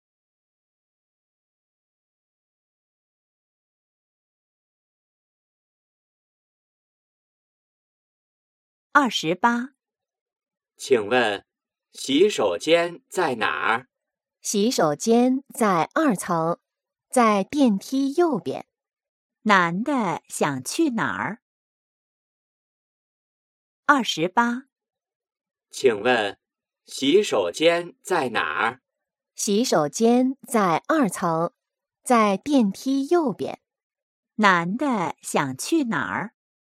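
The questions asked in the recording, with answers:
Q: 男的想去哪儿?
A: 洗手间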